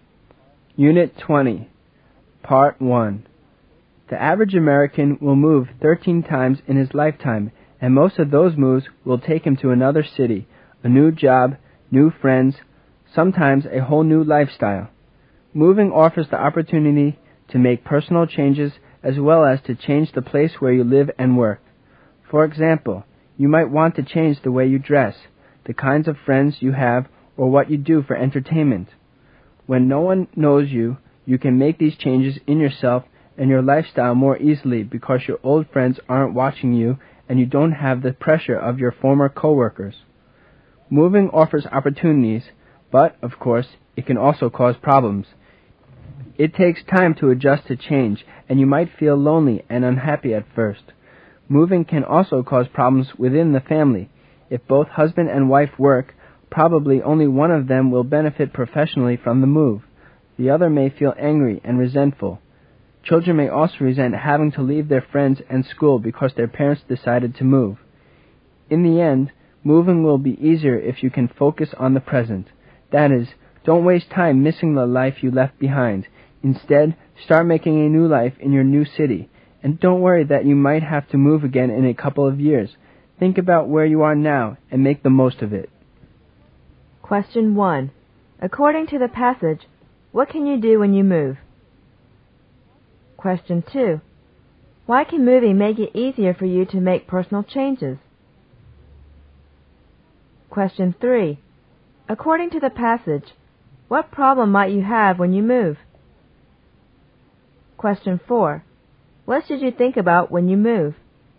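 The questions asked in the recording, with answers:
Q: According to the passage, what can you do when you move?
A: Make personal changes as well as change where you live and work

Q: Why can moving make it easier for you to make personal changes?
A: No one knows you; old friends aren't watching and there's no pressure from former coworkers

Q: According to the passage, what problem might you have when you move?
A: You might feel lonely and unhappy at first; it can cause family problems

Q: What should you think about when you move?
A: The present: where you are now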